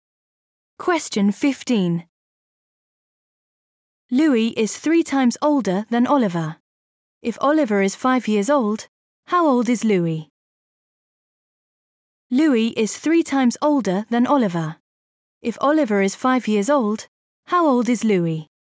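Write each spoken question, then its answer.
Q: If Oliver is 5 years old, how old is Louis?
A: 15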